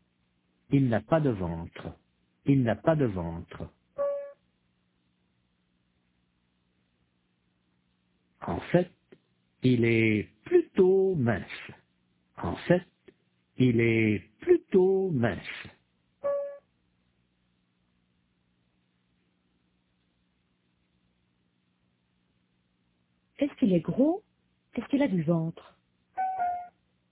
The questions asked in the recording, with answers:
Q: Est-ce qu'il est gros? Est-ce qu'il a du ventre?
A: Non, il n'est pas gros du tout.